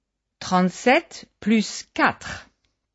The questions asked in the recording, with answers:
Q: 37 plus 4.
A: Ça fait 41.